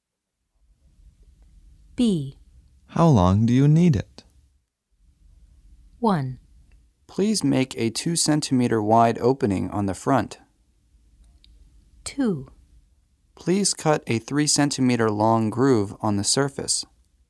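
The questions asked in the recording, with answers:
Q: How long do you need it?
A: 2: Please cut a 3 centimeter long groove on the surface.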